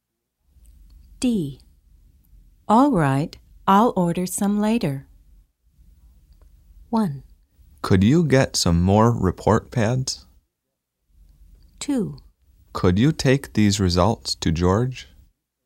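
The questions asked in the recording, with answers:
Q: All right, I'll order some later.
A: 1: Could you get some more report pads?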